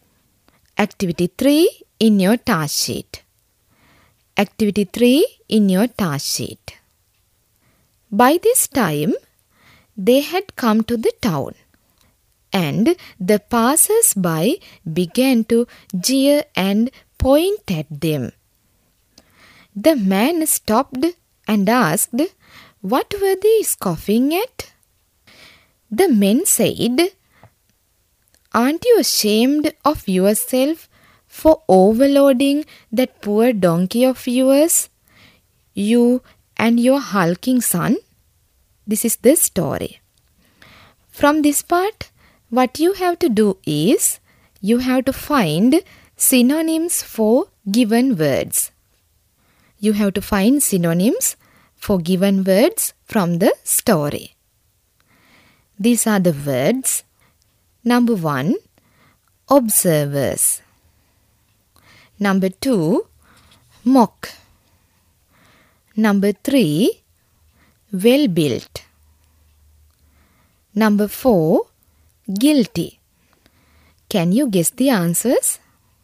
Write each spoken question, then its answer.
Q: Number 1, observers.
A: Number 1, synonym for observers is passers-by.

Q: Number 2, mock.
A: They are jeer or scoff.

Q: Number 3, well-built.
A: Hulking.

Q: Number 4, guilty.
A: Yes, synonym for this word is ashamed.